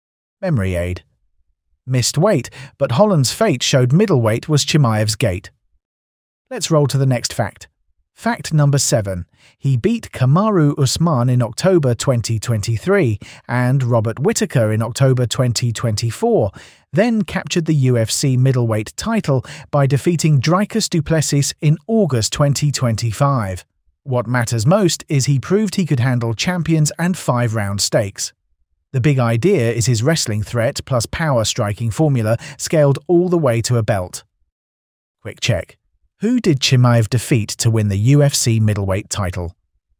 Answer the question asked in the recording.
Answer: Correct answer, Dricus du Plessis.